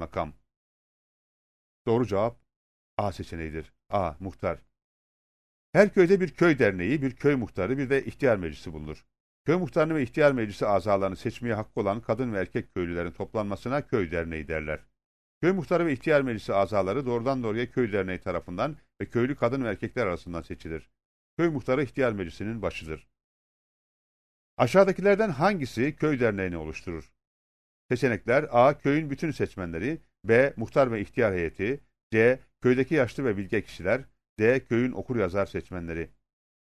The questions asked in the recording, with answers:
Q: Aşağıdakilerden hangisi köy derneğini oluşturur?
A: Doğru cevap A seçeneğidir.